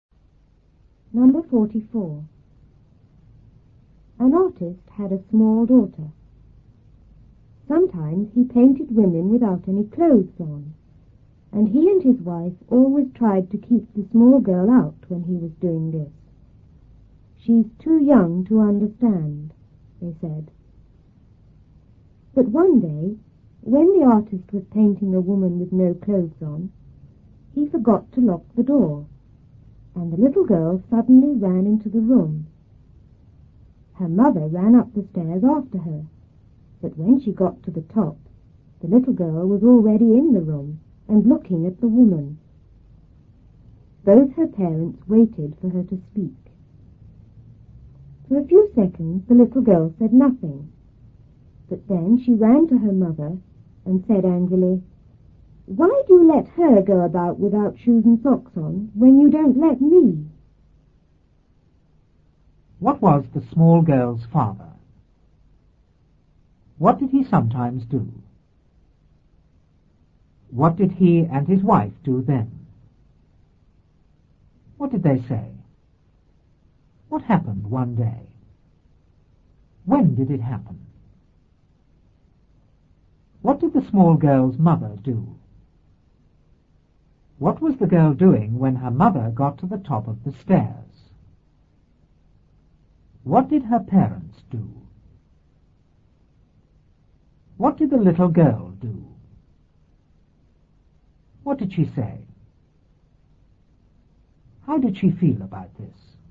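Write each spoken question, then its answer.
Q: What was the small girl's father?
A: An artist

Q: What did he sometimes do?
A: He painted women without any clothes on

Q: What did he and his wife do then?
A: They tried to keep the small girl out

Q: What did they say?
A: She's too young to understand

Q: What happened one day?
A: He forgot to lock the door and the little girl ran into the room

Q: When did it happen?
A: When the artist was painting a woman with no clothes on

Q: What did the small girl's mother do?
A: She ran up the stairs after her

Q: What was the girl doing when her mother got to the top of the stairs?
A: Looking at the woman in the room

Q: What did her parents do?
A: They waited for her to speak

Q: What did the little girl do?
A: She said nothing for a few seconds, then ran to her mother

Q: What did she say?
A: Why do you let her go about without shoes and socks on when you don't let me?

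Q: How did she feel about this?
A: Angry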